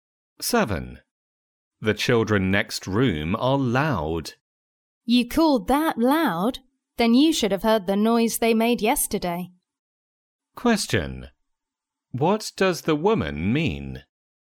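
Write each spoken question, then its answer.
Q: What does the woman mean?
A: The children were even noisier yesterday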